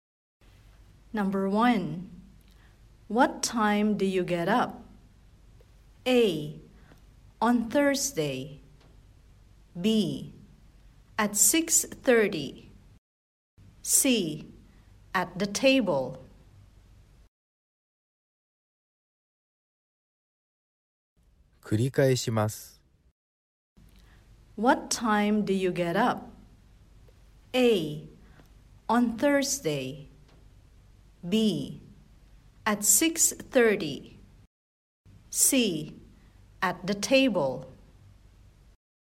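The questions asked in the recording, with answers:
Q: What time do you get up?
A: B: At 6:30.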